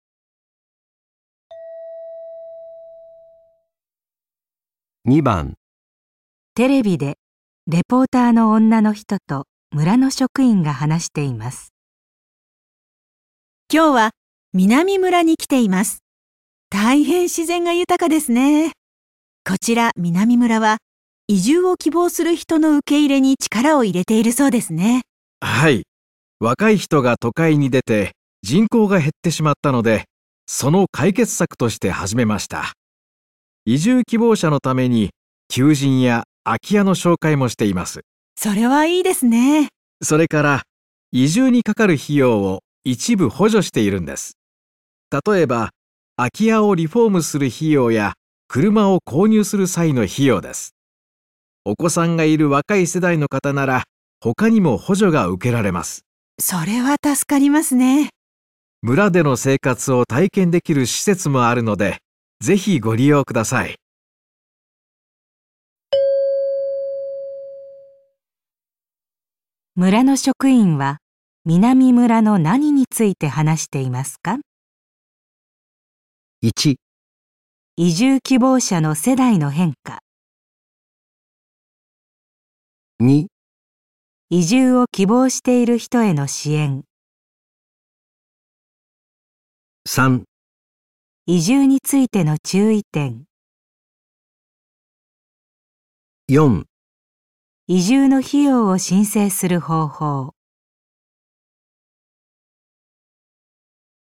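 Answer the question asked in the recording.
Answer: 移住を希望している人への支援

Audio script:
女:それはいいですね。
男:それから、移住にかかる費用を一部補助しているんです。例えば、空き家をリフォームする費用や車を購入する際の費用です。お子さんがいる若い世代の方なら、他にも補助が受けられます。
女:それは助かりますね。
男:村での生活を体験できる施設もあるので、ぜひご利用ください。
村の職員は南村の何について話していますか。
移住についての注意点。

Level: N2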